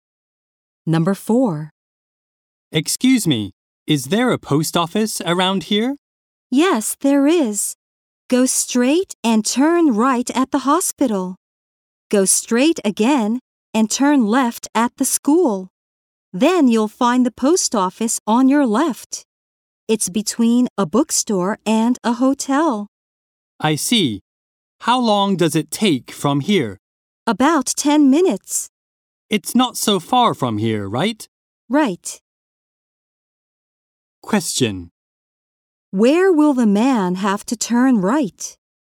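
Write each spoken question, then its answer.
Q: Where will the man have to turn right?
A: At the hospital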